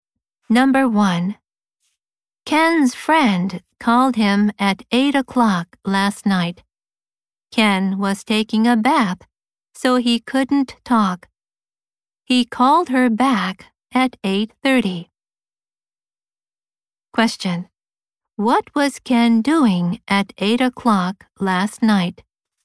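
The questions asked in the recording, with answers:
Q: What was Ken doing at 8 o'clock last night?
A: Taking a bath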